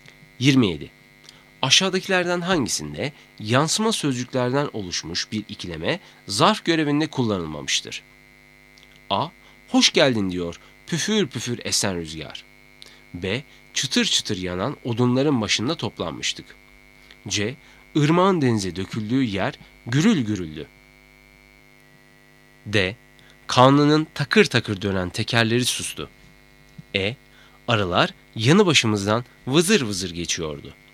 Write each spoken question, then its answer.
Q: Aşağıdakilerden hangisinde yansıma sözcüklerden oluşmuş bir ikileme zarf görevinde kullanılmamıştır?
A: Doğru cevap C. Irmağın denize döküldüğü yer gürül gürüldü.